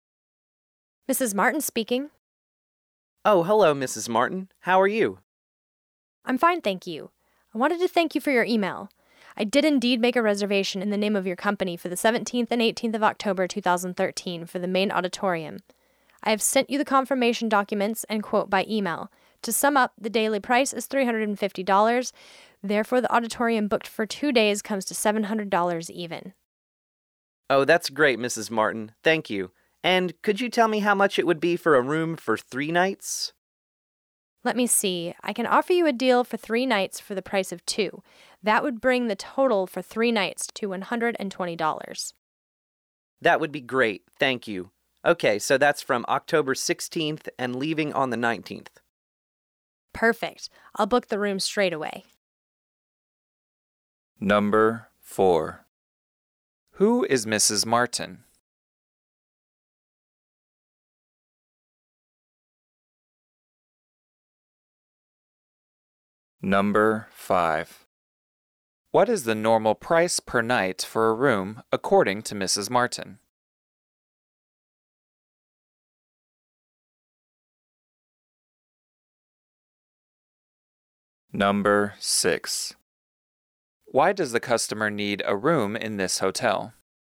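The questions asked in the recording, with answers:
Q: Who is Mrs. Martin?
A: A hotel employee who handles reservations

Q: What is the normal price per night for a room according to Mrs. Martin?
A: $60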